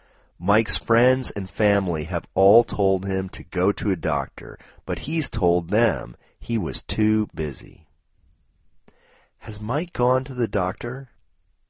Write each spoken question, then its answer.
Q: Has Mike gone to the doctor?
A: No, Mike hasn't gone to the doctor.